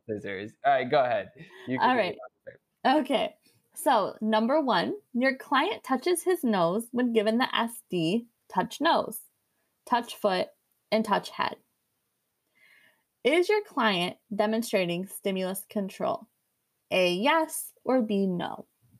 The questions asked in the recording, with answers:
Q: Is your client demonstrating stimulus control?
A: This one is no.